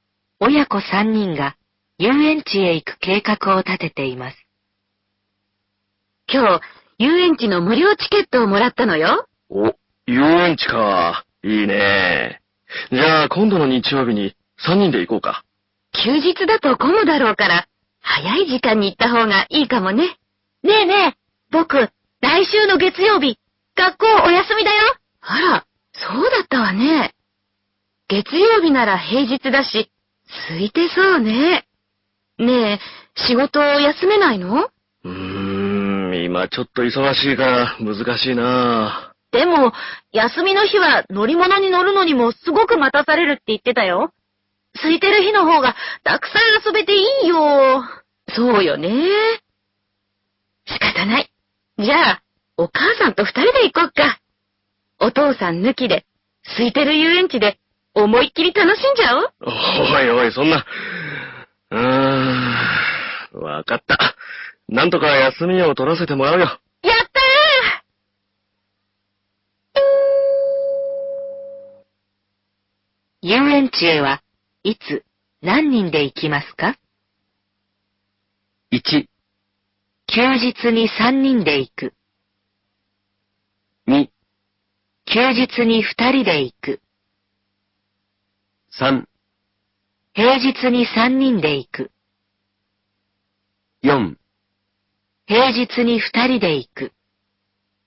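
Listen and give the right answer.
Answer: 3: 平日に3人で行く。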